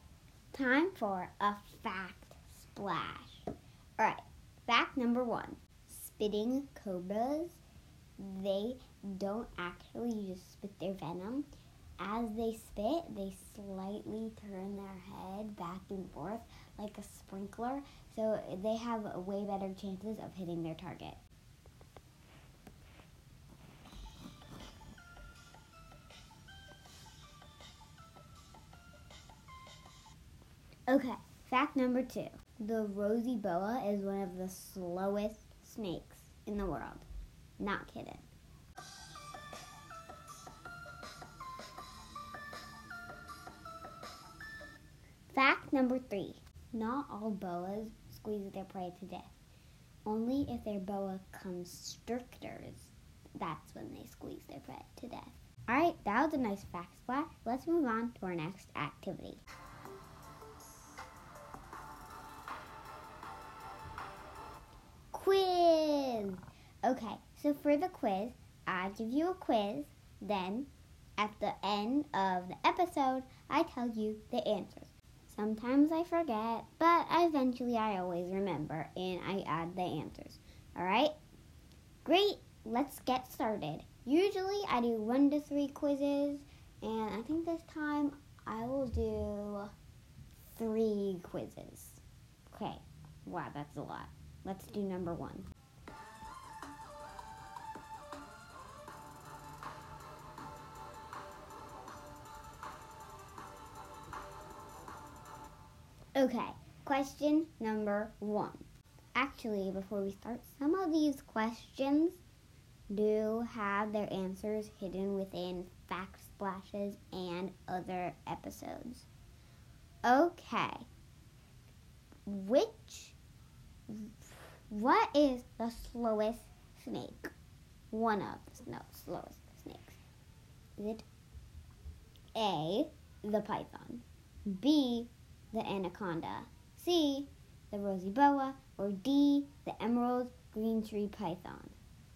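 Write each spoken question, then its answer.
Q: What is the slowest snake?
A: C: the rosy boa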